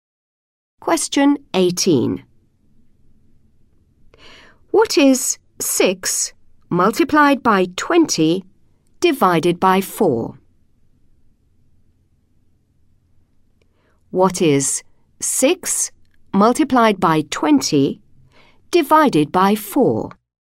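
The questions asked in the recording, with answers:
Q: What is 6 multiplied by 20 divided by 4?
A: 30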